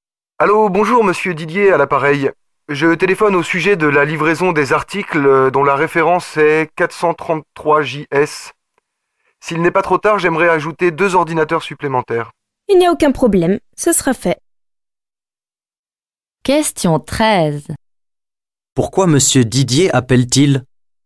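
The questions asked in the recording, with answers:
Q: Pourquoi monsieur Didier appelle-t-il?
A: Pour ajouter deux ordinateurs supplémentaires à sa commande (référence 433JS).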